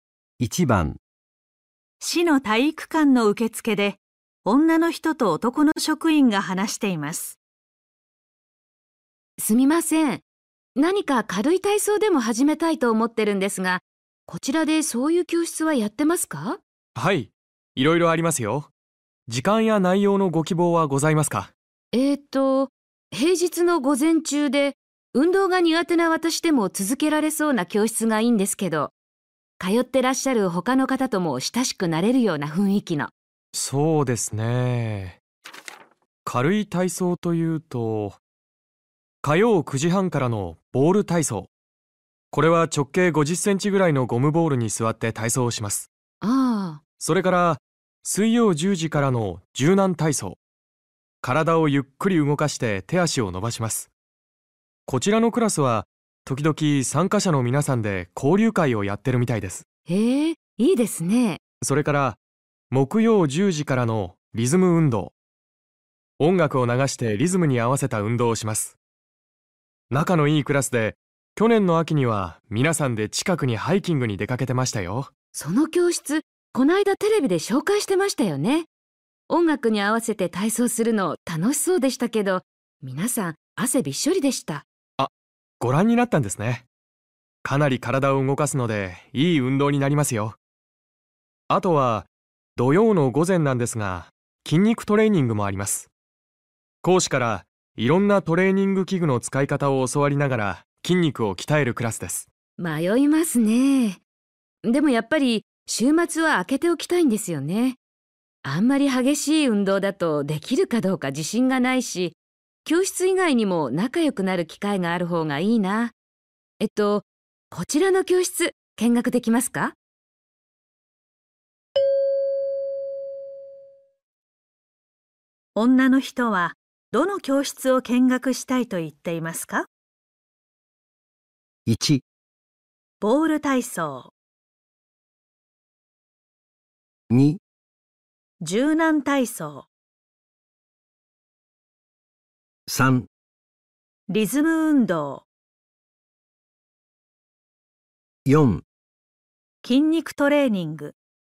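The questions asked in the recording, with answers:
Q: 女の人はどの教室を見学したいと言っていますか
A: 2: 柔軟体操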